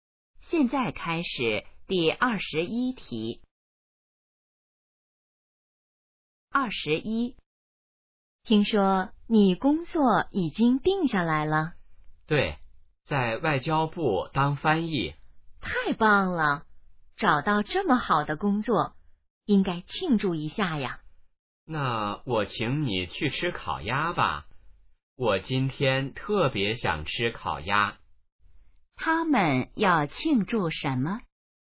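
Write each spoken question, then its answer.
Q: 他们要庆祝什么?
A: 找到了好工作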